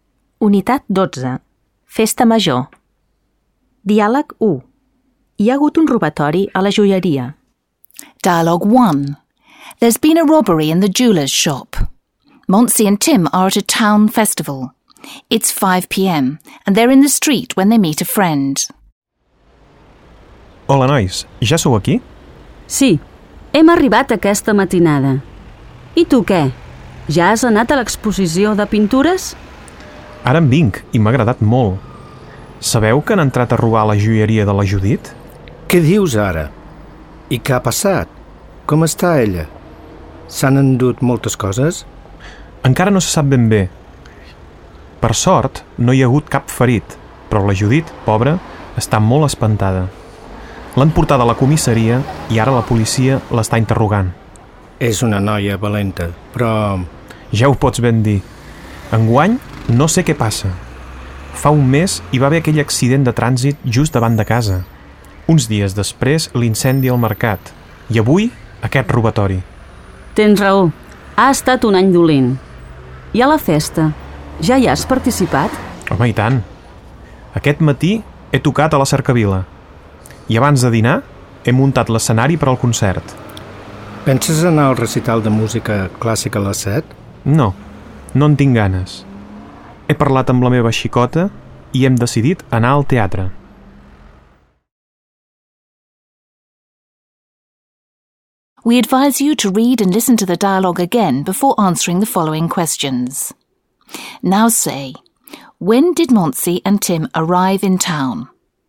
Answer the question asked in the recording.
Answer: Hem arribat aquesta matinada.